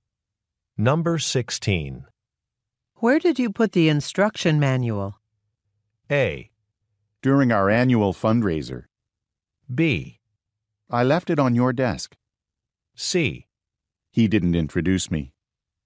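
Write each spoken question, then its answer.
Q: Where did you put the instruction manual?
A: B: I left it on your desk.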